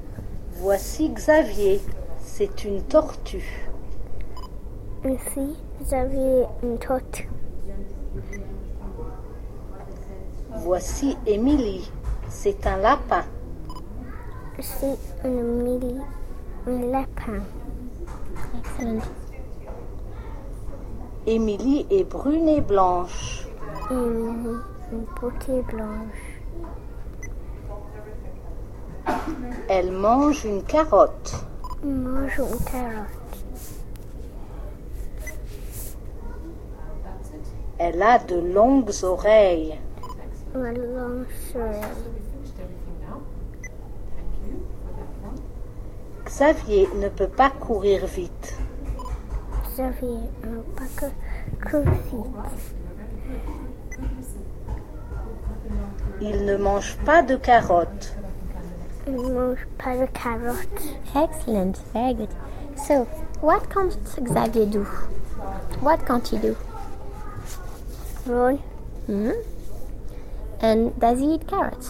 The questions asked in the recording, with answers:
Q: So, what can't Xavier do?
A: Run.

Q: And does he eat carrots?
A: No.